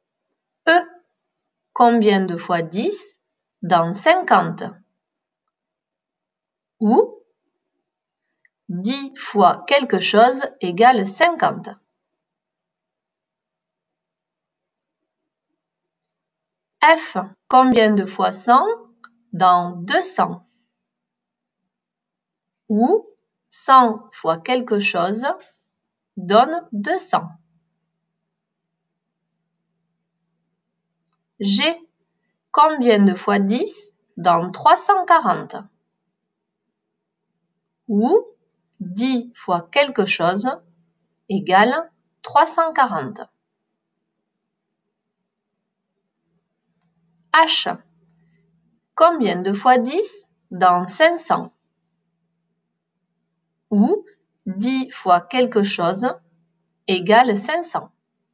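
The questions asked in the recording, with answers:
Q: combien de fois 10 dans 340?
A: 34

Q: combien de fois 10 dans 500?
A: 50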